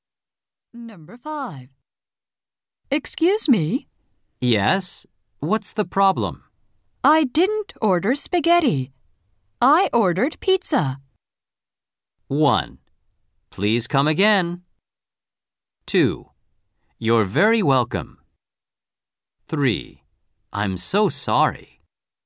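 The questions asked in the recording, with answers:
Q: I ordered pizza.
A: 3: I'm so sorry.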